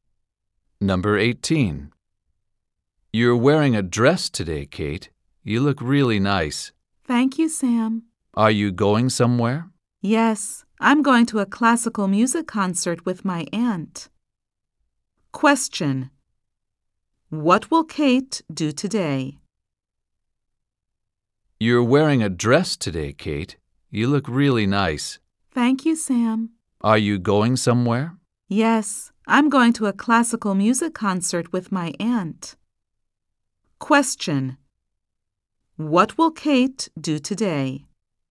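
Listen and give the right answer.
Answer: Go to a classical music concert with her aunt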